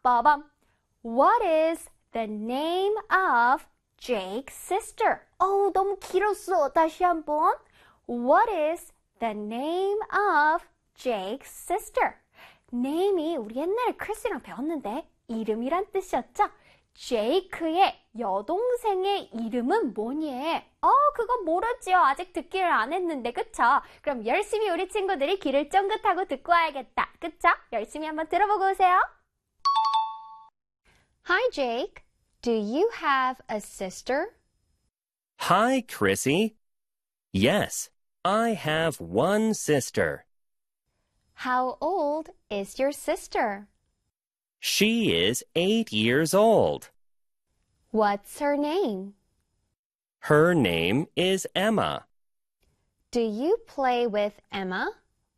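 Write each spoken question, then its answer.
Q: What is the name of Jake's sister?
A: Emma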